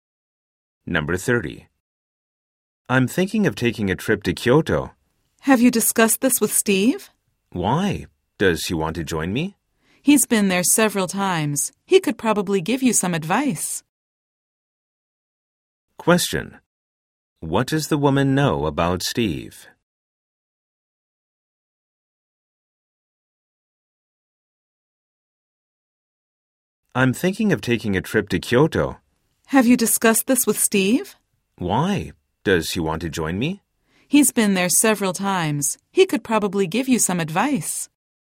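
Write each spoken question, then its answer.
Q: What does the woman know about Steve?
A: He has been to Kyoto several times.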